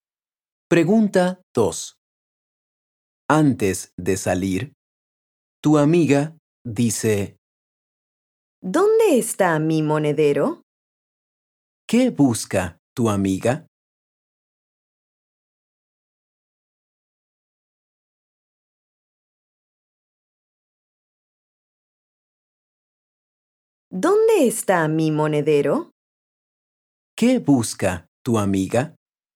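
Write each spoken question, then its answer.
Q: ¿Qué busca tu amiga?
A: su monedero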